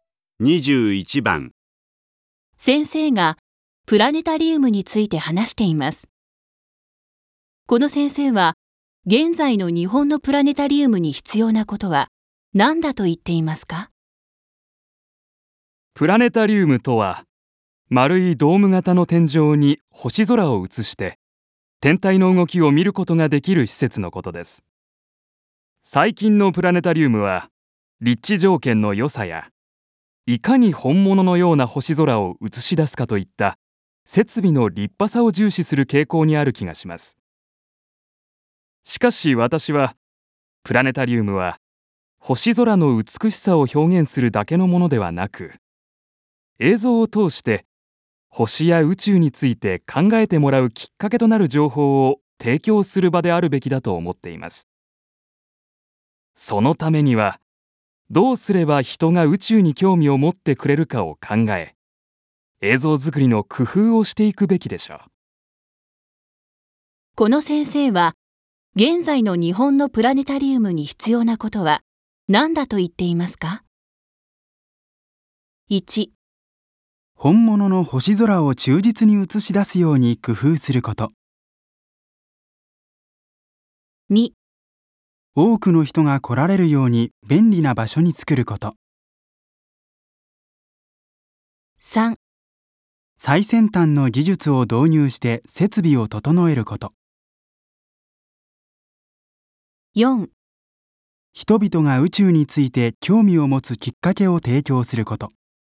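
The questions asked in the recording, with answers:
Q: この先生は現在の日本のプラネタリウムに必要なことは何だと言っていますか?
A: 4: 人々が宇宙について興味を持つきっかけを提供すること。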